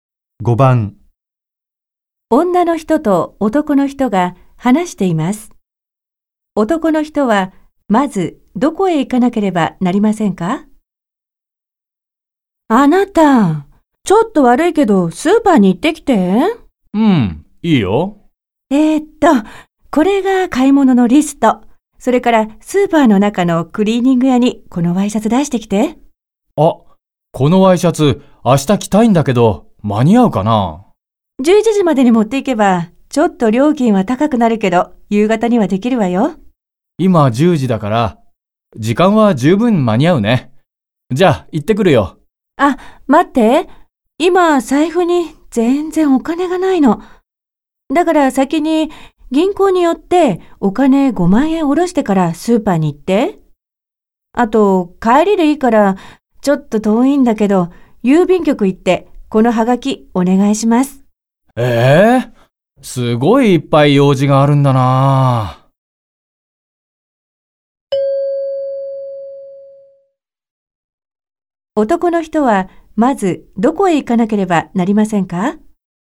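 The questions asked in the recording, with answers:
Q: 男の人は、まずどこへ行かなければなりませんか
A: 銀行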